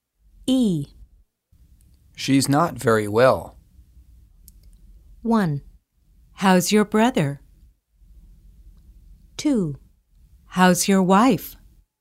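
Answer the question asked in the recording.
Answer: 2: How's your wife?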